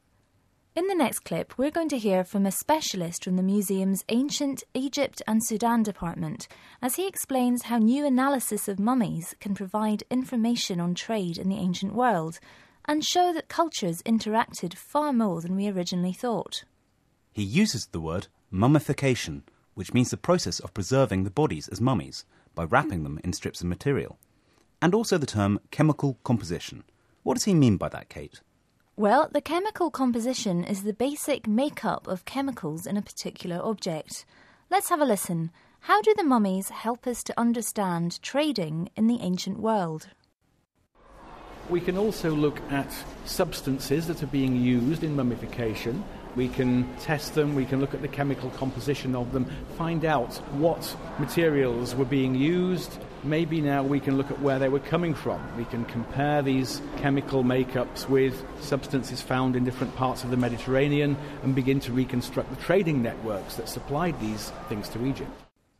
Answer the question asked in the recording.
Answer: So an object that we thought was uniquely Egyptian, a mummy, can give us information about interaction across the ancient world by analysing what materials were being used and where they've come from.